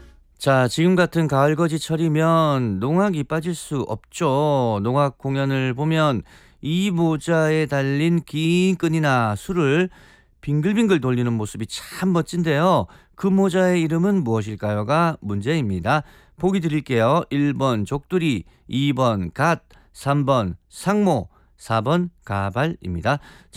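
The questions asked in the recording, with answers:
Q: 그 모자의 이름은 무엇일까요가 문제입니다.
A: 3: 상모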